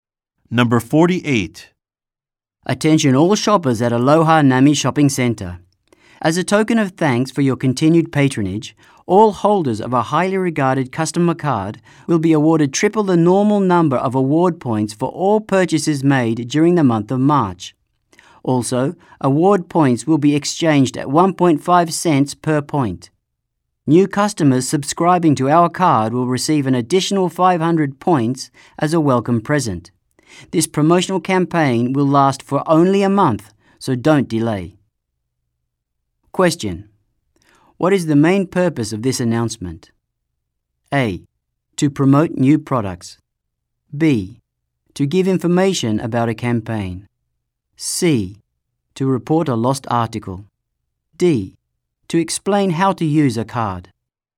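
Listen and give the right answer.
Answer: B: To give information about a campaign.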